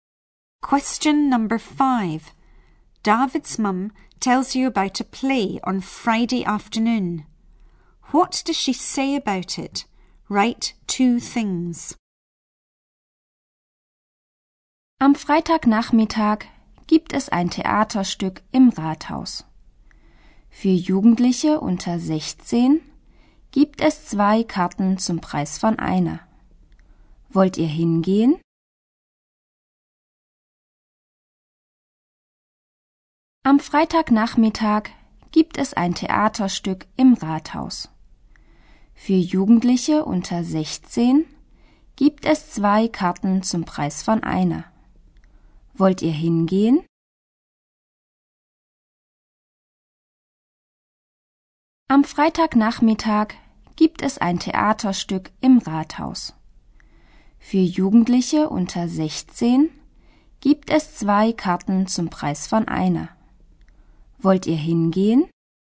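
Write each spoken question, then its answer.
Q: What does she say about it?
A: It is in the town hall; under-16s get two tickets for the price of one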